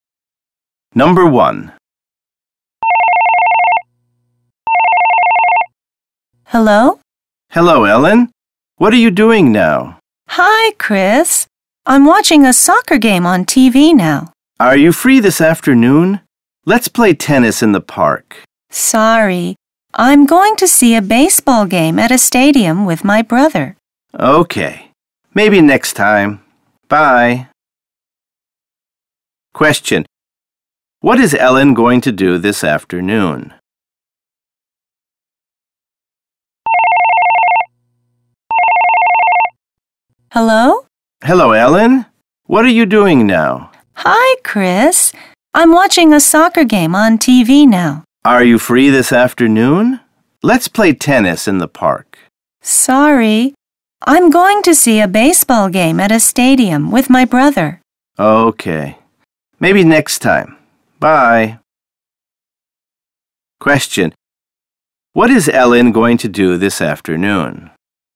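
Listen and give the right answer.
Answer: See a baseball game at a stadium with her brother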